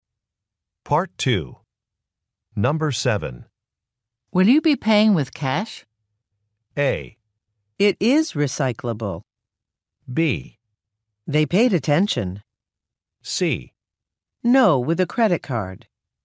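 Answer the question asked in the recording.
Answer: C: No, with a credit card.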